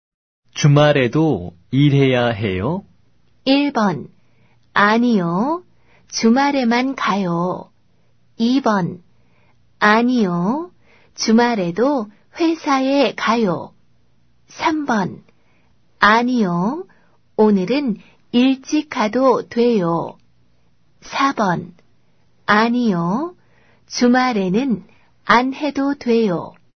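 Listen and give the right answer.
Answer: 4: 아니요. 주말에는 안 해도 돼요.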